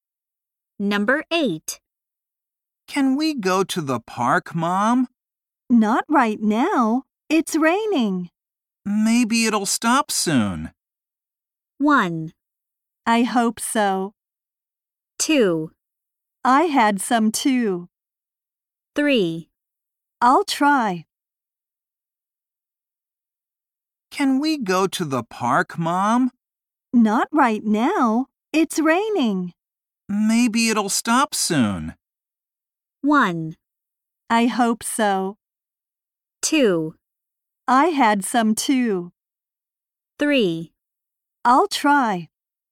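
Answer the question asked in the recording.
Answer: 1: I hope so.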